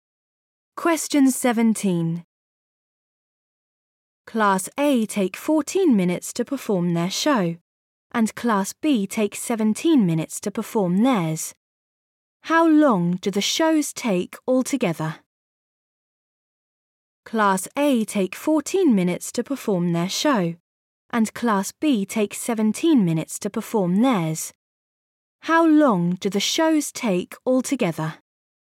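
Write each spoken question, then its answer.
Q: How long do the shows take altogether?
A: 31 minutes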